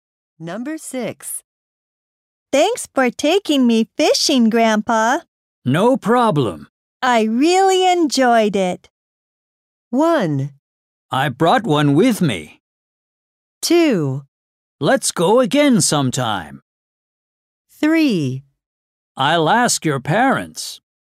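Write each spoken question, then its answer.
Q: I really enjoyed it.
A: 2: Let's go again sometime.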